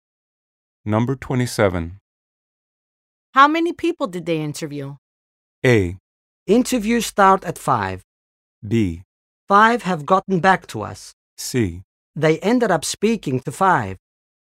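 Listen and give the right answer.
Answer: C: They ended up speaking to 5.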